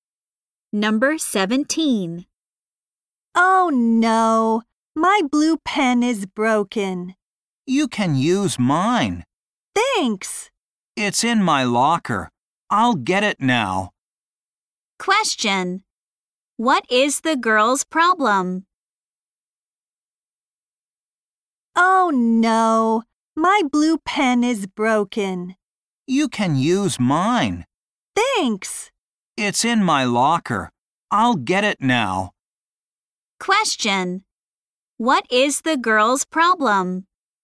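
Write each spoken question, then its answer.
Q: What is the girl's problem?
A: Her blue pen is broken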